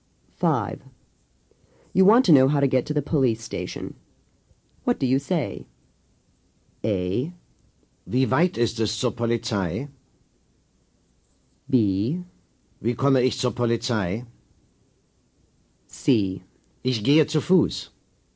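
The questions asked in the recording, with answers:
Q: You want to know how to get to the police station. What do you say?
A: B: Wie komme ich zur Polizei?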